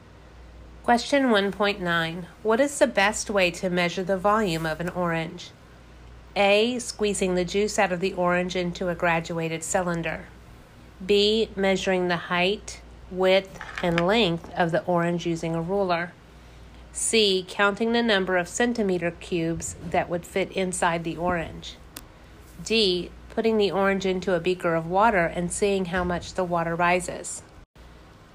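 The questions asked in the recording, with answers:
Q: What is the best way to measure the volume of an orange?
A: D: Putting the orange into a beaker of water and seeing how much the water rises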